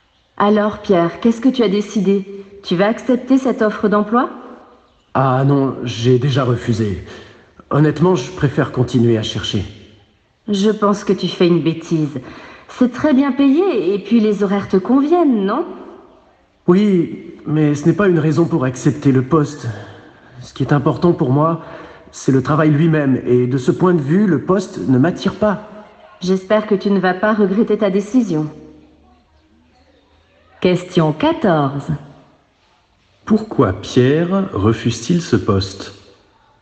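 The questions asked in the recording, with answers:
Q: Pourquoi Pierre refuse-t-il ce poste?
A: Le travail lui-même ne l'attire pas.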